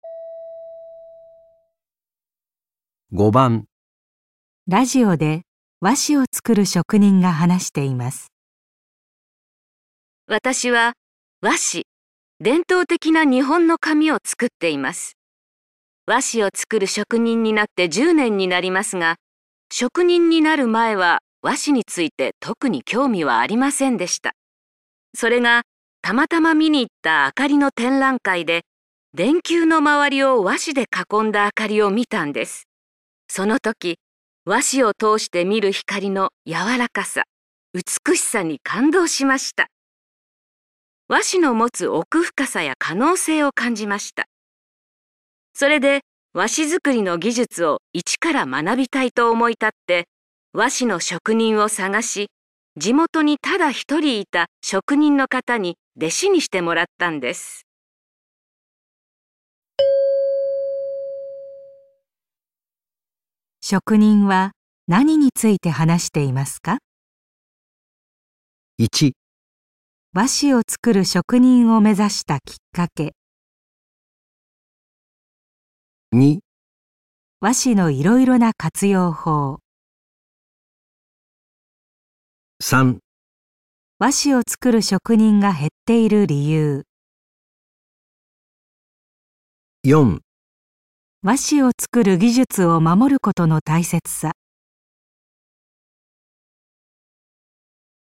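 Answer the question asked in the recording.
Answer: 和紙を作る職人を目指したきっかけ

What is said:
その時、和紙を通してみる光の柔らかさ、美しさに感動しました。和紙の持つ奥深さや可能性を感じました。それで、和紙作りの技術を一から学びたいと思ってくて和紙の職人を探し、地元にただ1人いた職人の方に弟子にしてもらったんです。
職人は何について話していますか。

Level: N2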